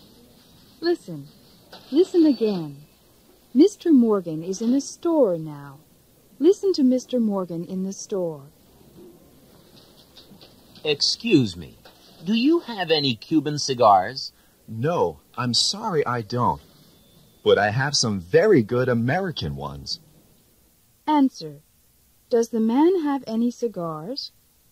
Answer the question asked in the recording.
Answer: Yes, he does.